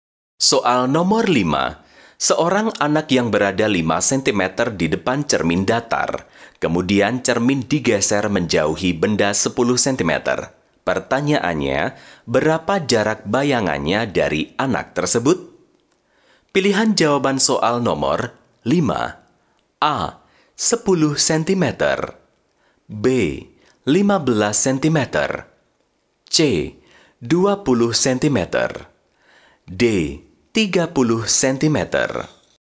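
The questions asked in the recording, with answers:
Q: Pertanyaannya, berapa jarak bayangannya dari anak tersebut?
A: D: 30 cm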